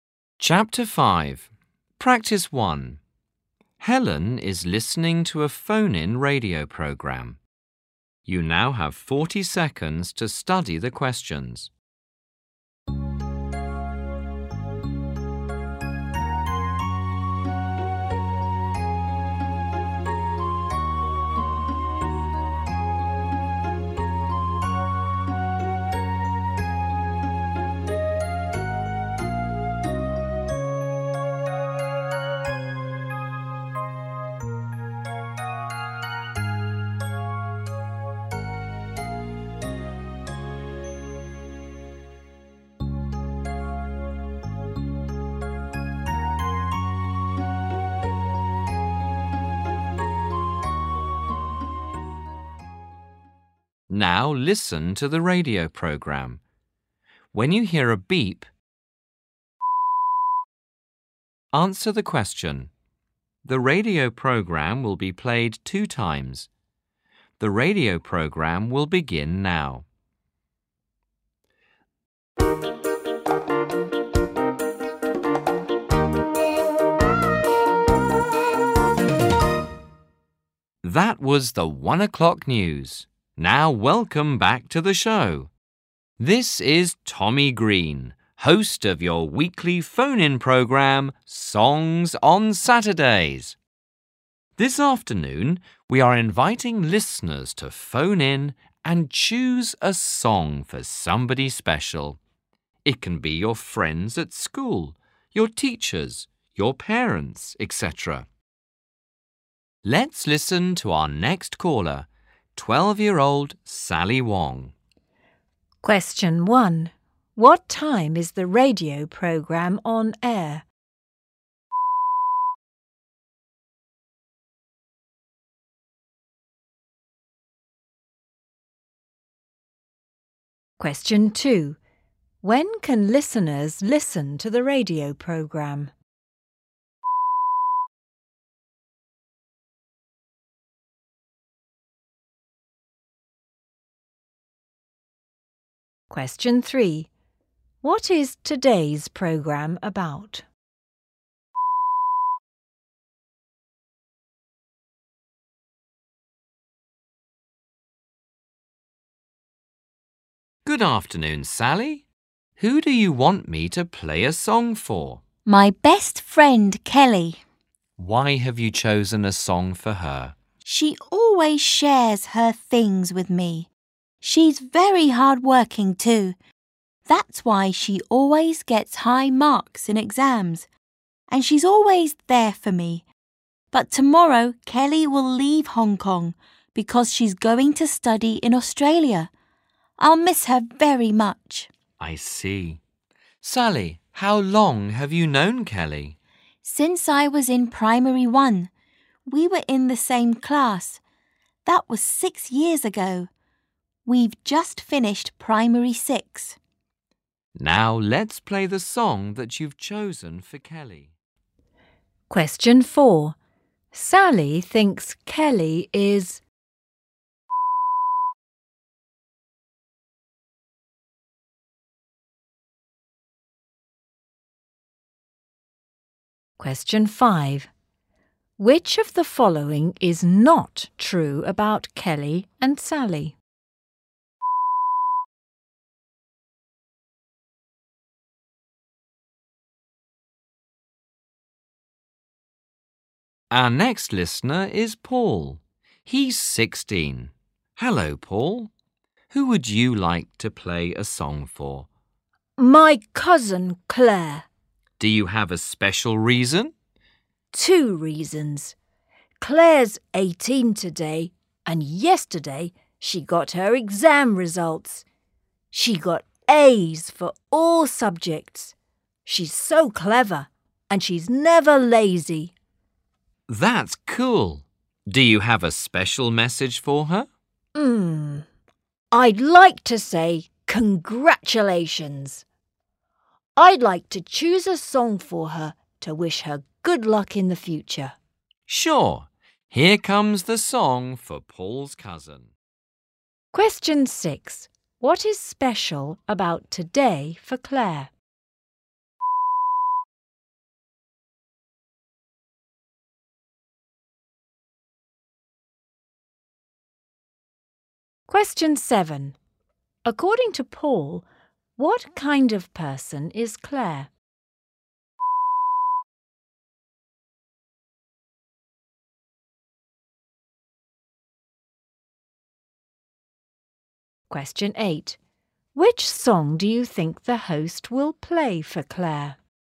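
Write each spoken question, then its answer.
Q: When can listeners listen to the radio program?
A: On Saturday afternoons (every week)

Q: What is today's programme about?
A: Listeners phone in to choose a song for somebody special

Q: What is special about today for Claire?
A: It is her 18th birthday

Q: According to Paul, what kind of person is Claire?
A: Clever and never lazy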